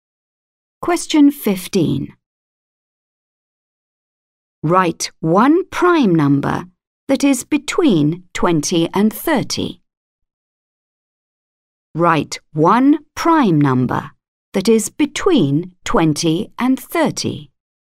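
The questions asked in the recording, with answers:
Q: Write one prime number that is between 20 and 30.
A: 23 or 29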